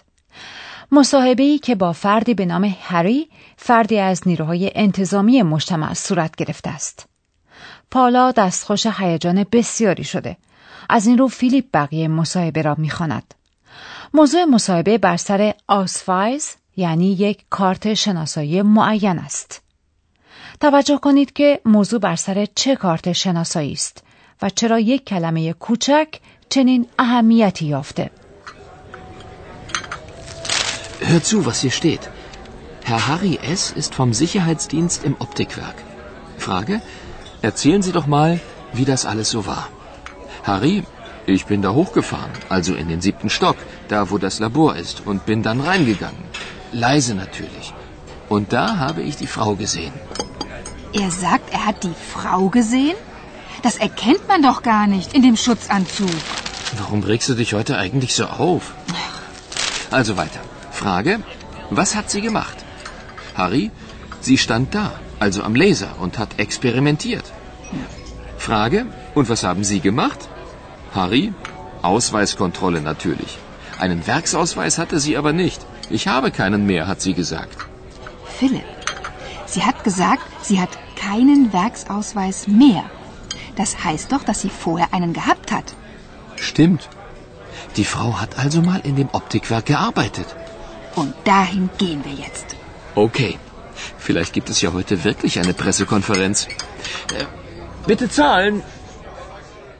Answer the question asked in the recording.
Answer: آیا متوجه کلمه مرکب ورکس آسفایز یعنی کارت شناسایی کارخانه یا مجتمع شدید؟